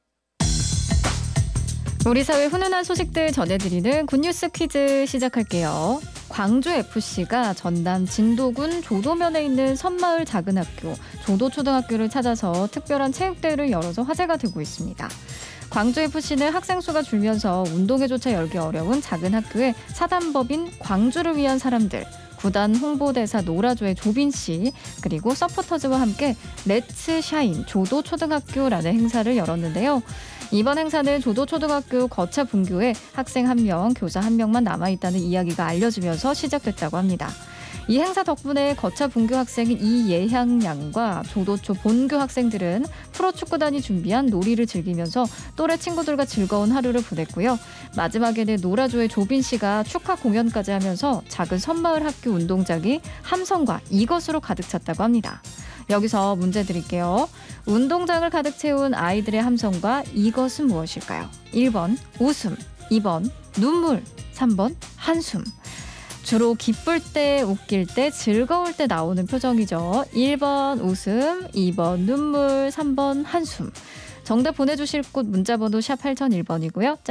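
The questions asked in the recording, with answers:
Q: 운동장을 가득 채운 아이들의 함성과 이것은 무엇일까요?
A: 1번: 웃음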